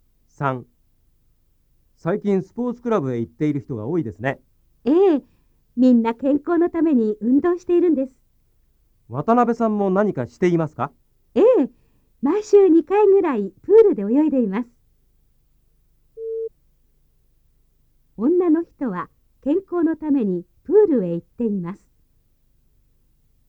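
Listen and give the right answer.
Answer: ○(正しい)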